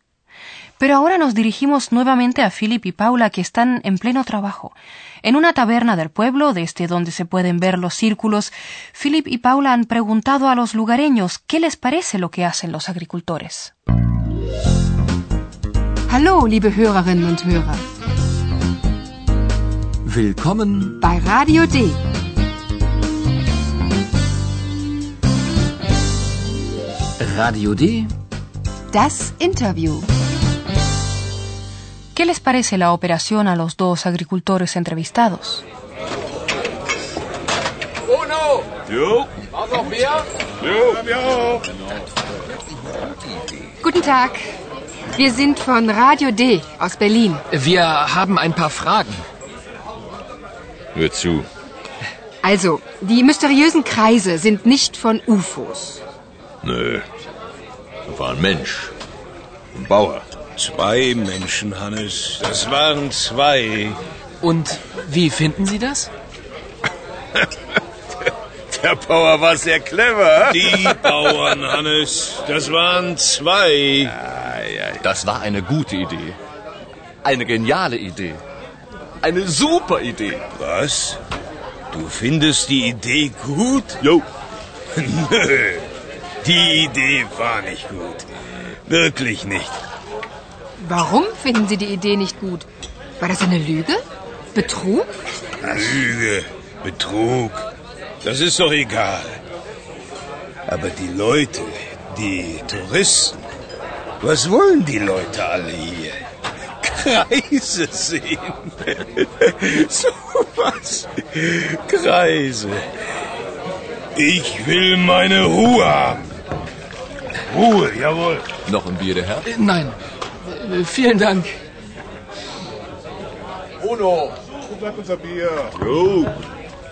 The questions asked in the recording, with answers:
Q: ¿Qué les parece la operación a los dos agricultores entrevistados?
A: Como han escuchado, los dos agricultores del pueblo tienen opiniones opuestas.